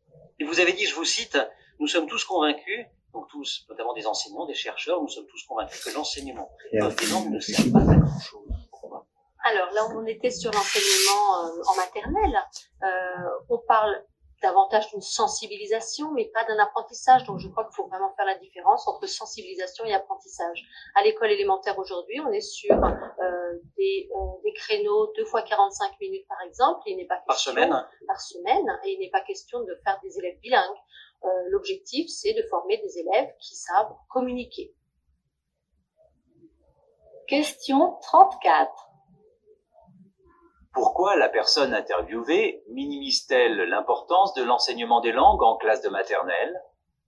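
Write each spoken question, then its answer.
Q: Pourquoi la personne interviewée minimise-t-elle l'importance de l'enseignement des langues en classe de maternelle ?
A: Parce qu'en maternelle, il s'agit d'une sensibilisation aux langues et non d'un véritable apprentissage.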